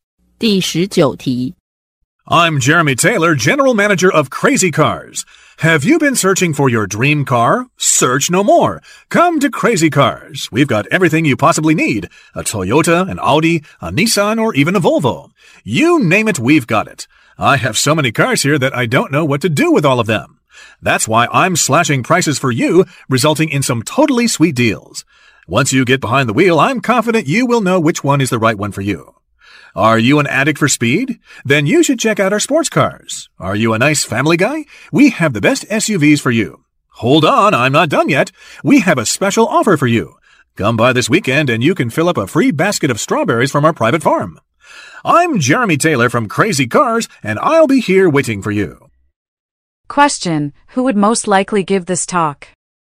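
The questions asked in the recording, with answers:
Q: Who would most likely give this talk?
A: A car dealer (general manager of Crazy Cars)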